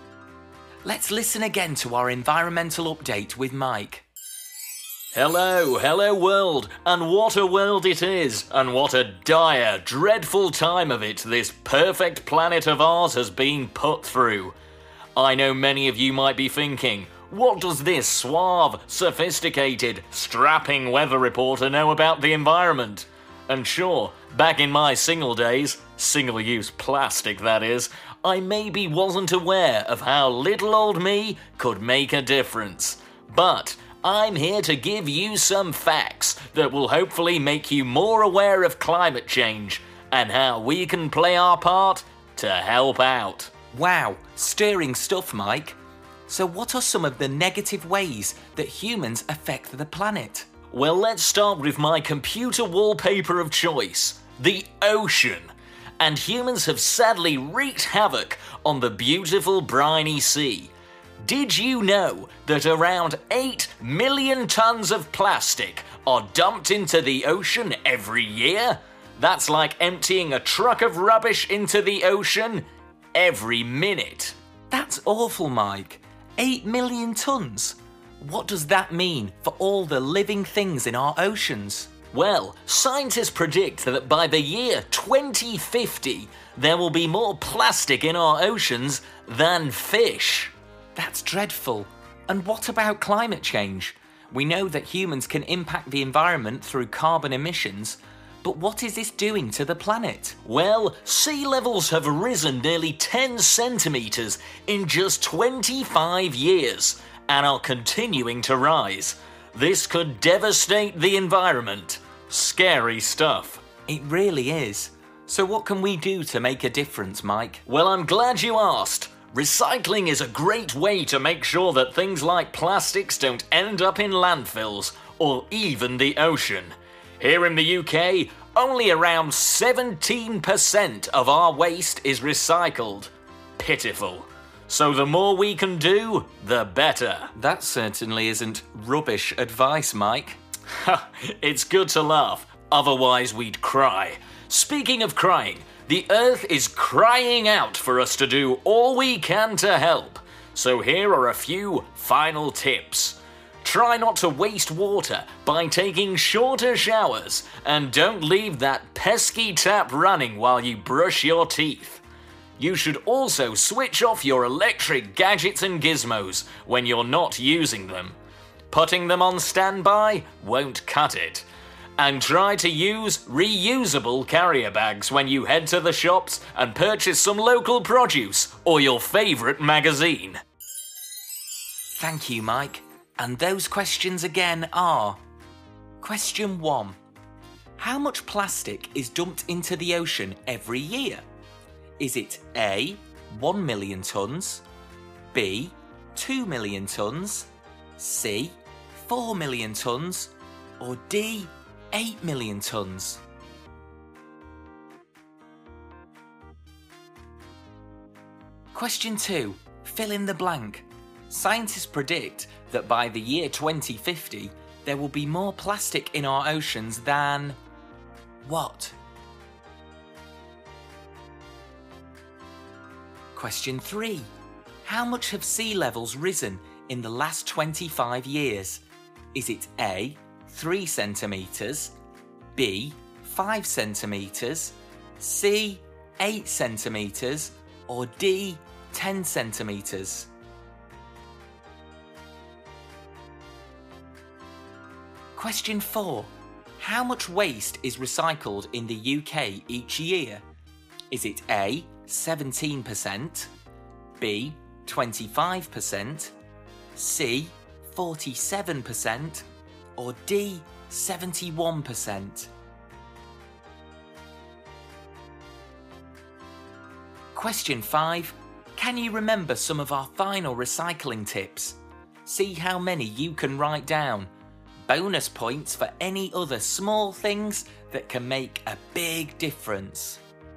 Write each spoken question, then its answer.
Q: How much plastic is dumped into the ocean every year?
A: Around 8 million tons of plastic are dumped into the ocean every year, so the answer is D.

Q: Scientists predict that by the year 2050, there will be more plastic in our oceans than...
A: Scientists predict that by the year 2050, there will be more plastic in our oceans than fish.

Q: How much have sea levels risen in the last 25 years?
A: The answer is D, 10 centimetres in 25 years, and still rising.

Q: How much waste is recycled in the UK each year?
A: The answer is A, 17%.

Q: Can you remember some of our final recycling tips?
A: There was trying to use less water when showering and brushing your teeth.